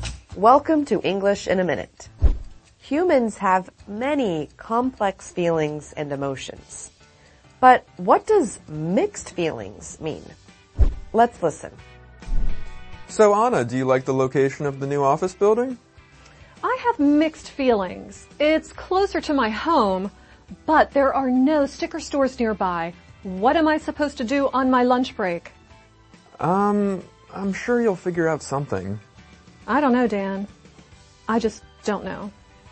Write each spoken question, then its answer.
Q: But what does mixed feelings mean?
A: If you have mixed feelings, you have conflicting emotions about something or someone.